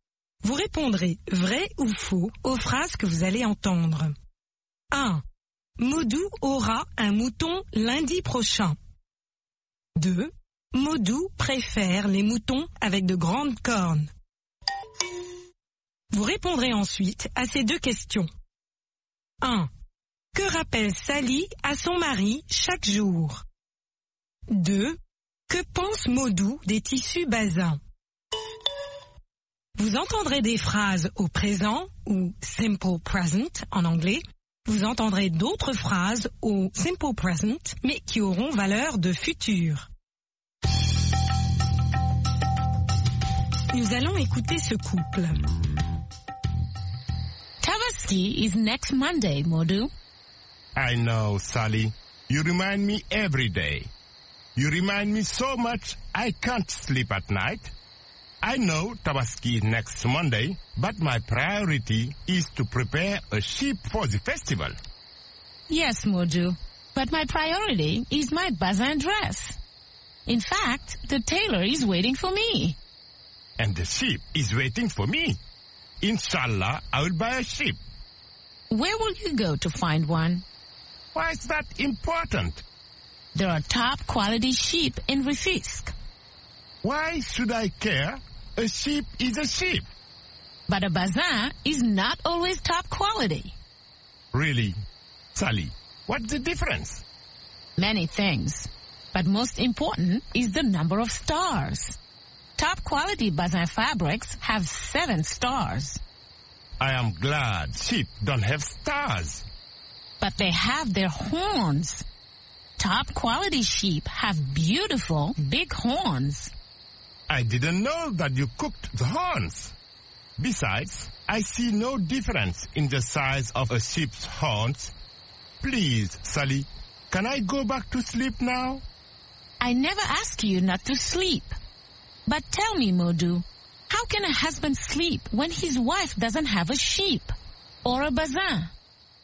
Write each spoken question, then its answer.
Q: Modou aura un mouton lundi prochain.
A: L'énoncé 1 est vrai. Modou aura un mouton lundi prochain.

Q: Modou préfère les moutons avec de grandes cornes.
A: L'énoncé 2 est faux. Modou préfère les moutons avec de grandes cornes.

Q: Que rappelle Sally à son mari chaque jour?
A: Sally rappelle chaque jour à son mari que la Tabaski est lundi prochain.